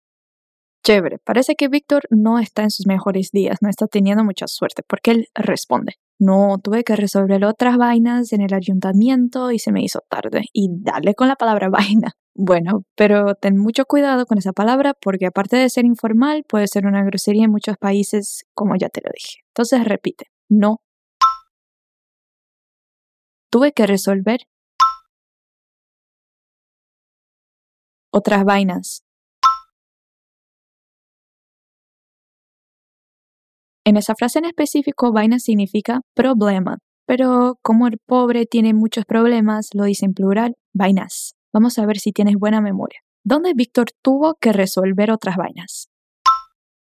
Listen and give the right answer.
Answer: En el ayuntamiento.